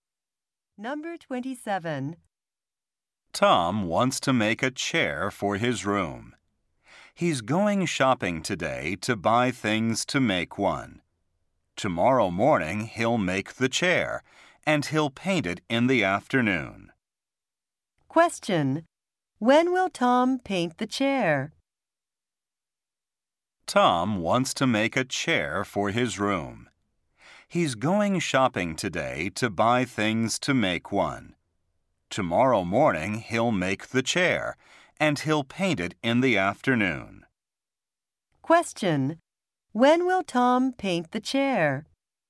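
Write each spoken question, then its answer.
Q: When will Tom paint the chair?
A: Tomorrow afternoon.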